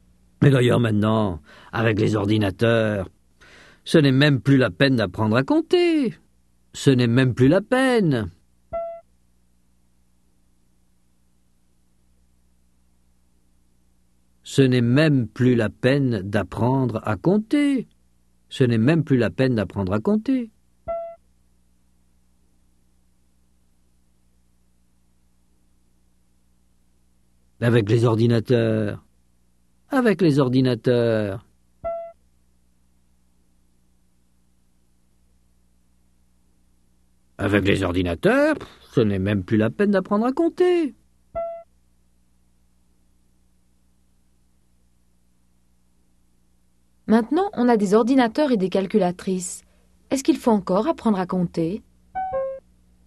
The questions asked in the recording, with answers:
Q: Est-ce qu'il faut encore apprendre à compter?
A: Non, ce n'est même plus la peine d'apprendre à compter.